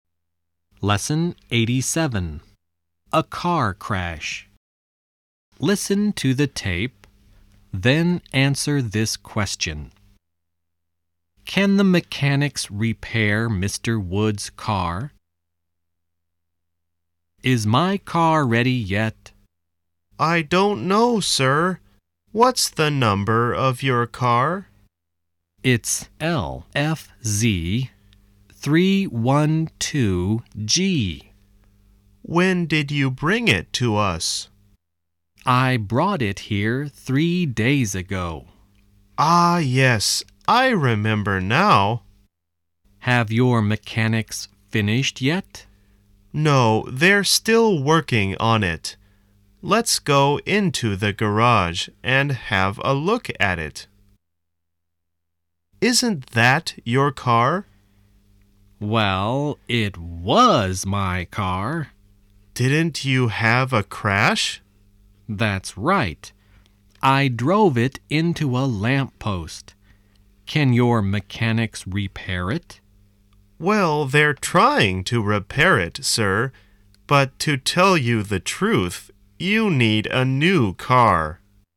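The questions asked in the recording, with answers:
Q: Can the mechanics repair Mr. Wood's car?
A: No, probably not; they're trying, but he needs a new car.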